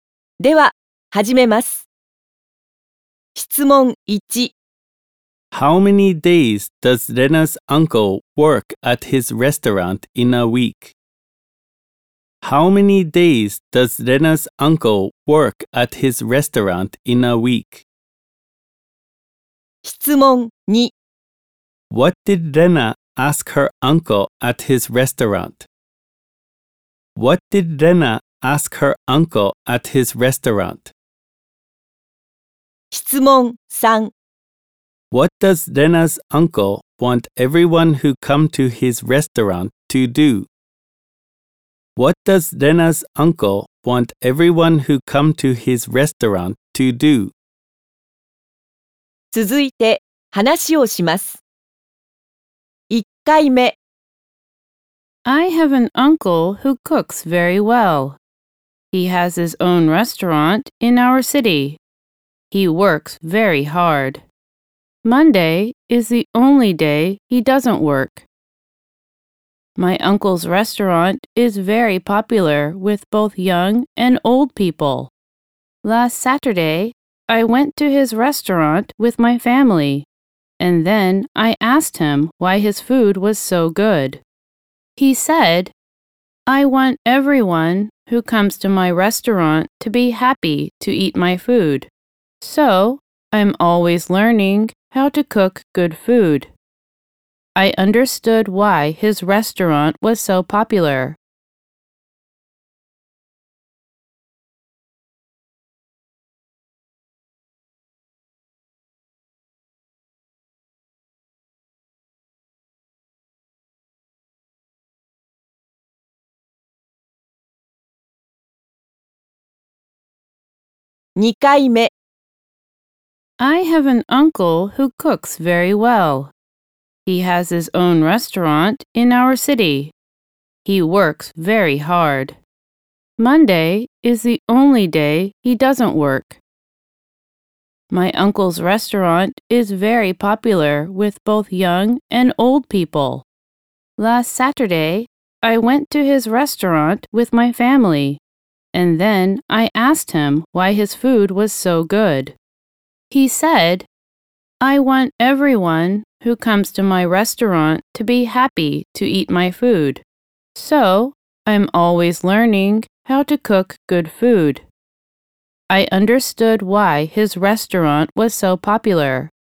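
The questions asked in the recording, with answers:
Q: How many days does Lena's uncle work at his restaurant in a week?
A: Six days.

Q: What did Lena ask her uncle at his restaurant?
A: She asked him why his food was so good.

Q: What does Lena's uncle want everyone who come to his restaurant to do?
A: To be happy to eat his food.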